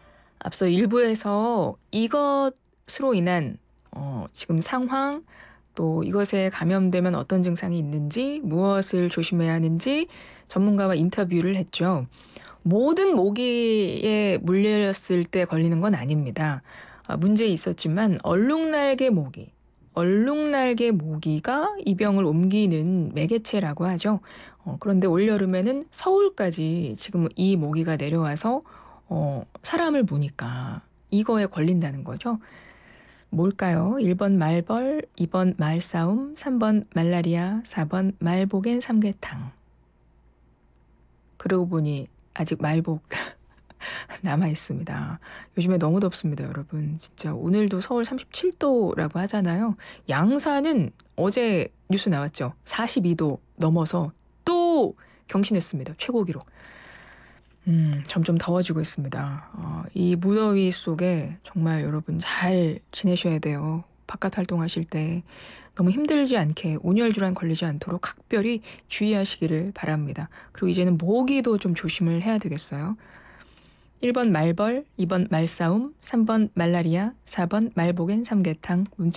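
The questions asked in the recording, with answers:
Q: 뭘까요? 1번 말벌, 2번 말싸움, 3번 말라리아, 4번 말복엔 삼계탕.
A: 3: 말라리아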